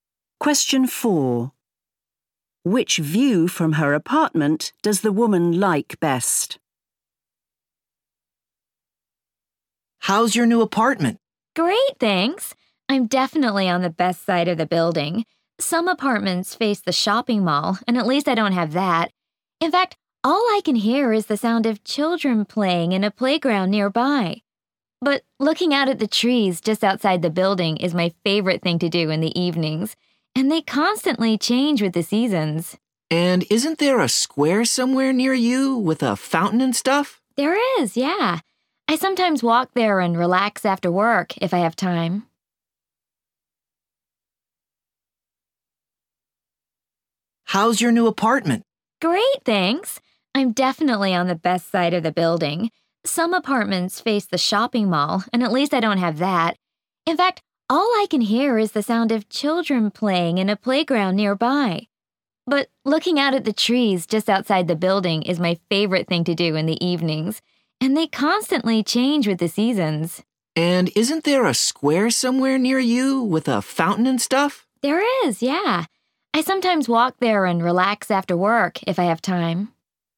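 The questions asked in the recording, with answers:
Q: Which view from her apartment does the woman like best?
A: the trees outside the building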